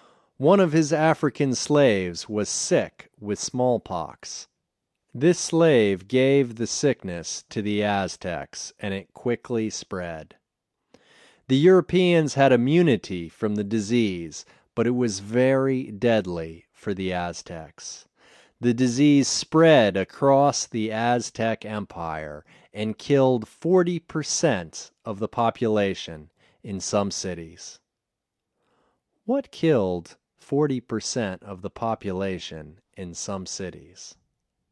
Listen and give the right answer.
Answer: Disease killed 40% of the population in some cities.